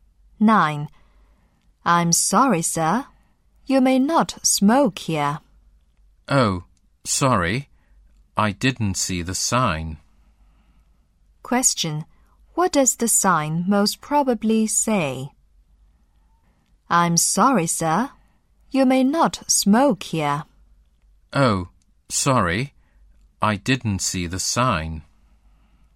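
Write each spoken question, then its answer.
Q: What does the sign most probably say?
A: No smoking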